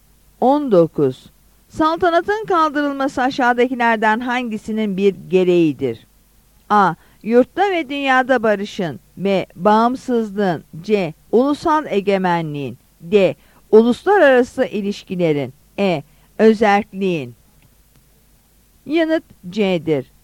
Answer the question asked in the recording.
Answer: Yanıt C'dir.